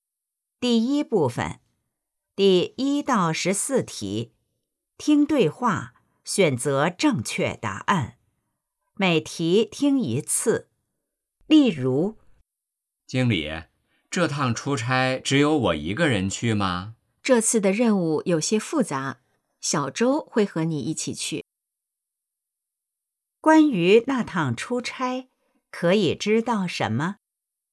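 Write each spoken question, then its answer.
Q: 关于那趟出差,可以知道什么?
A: 小周会和他一起去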